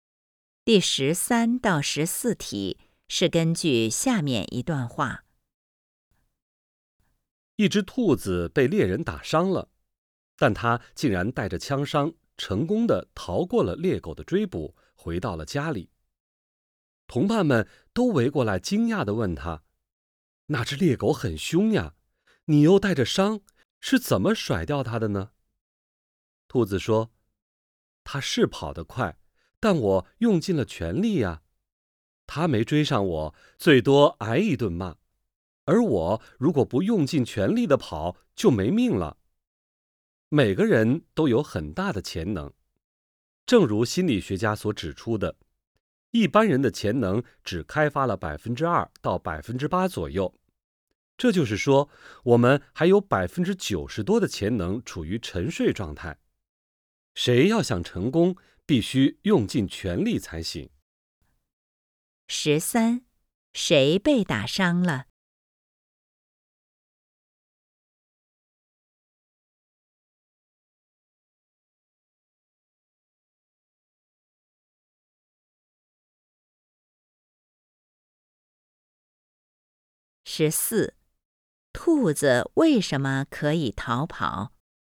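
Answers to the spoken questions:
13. 一只兔子
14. 因为它用尽了全力跑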